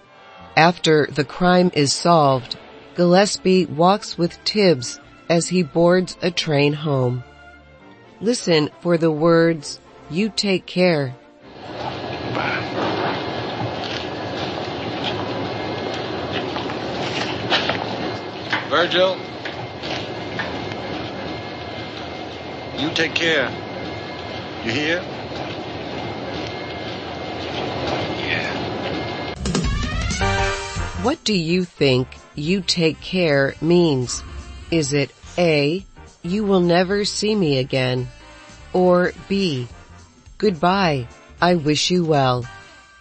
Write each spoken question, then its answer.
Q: What do you think "you take care" means?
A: The answer is B. Take care is a way to say goodbye and wish someone well.